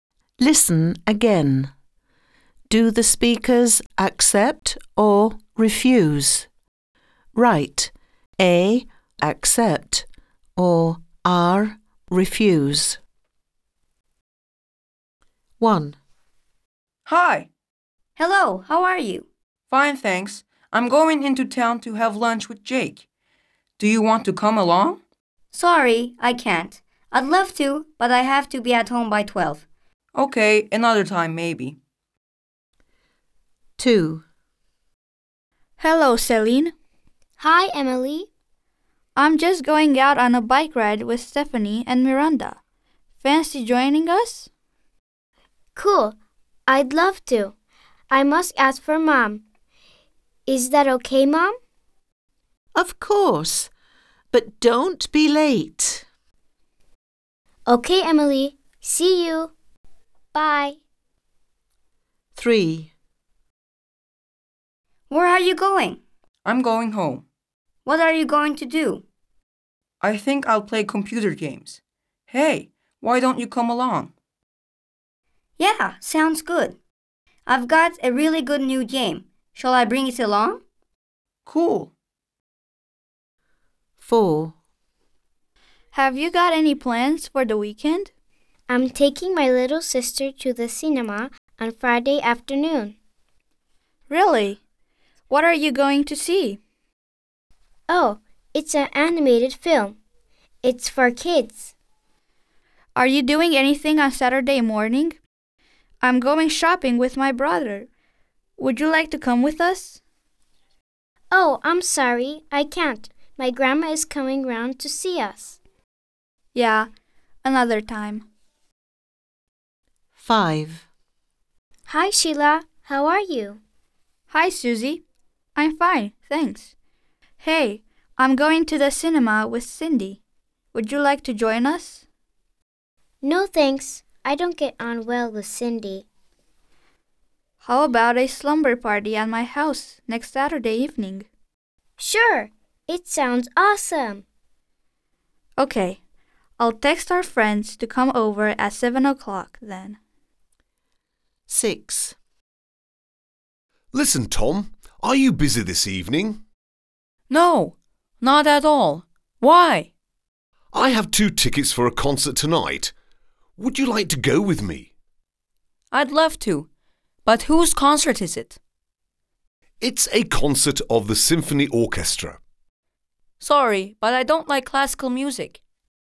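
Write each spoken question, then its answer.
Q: Do the speakers accept or refuse?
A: R: Refuse

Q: Do the speakers accept or refuse?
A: A: Accept

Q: Do the speakers accept or refuse?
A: A: Accept

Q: Do the speakers accept or refuse?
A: R: Refuse

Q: Do the speakers accept or refuse?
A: R: Refuse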